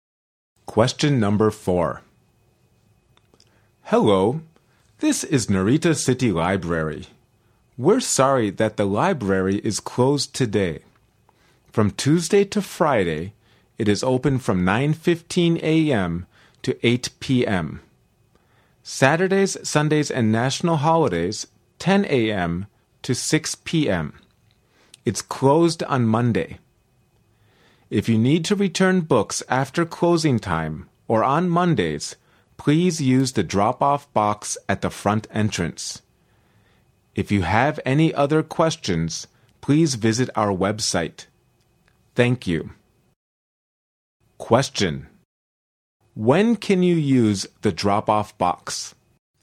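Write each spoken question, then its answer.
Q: When can you use the drop-off box?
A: After closing time or on Mondays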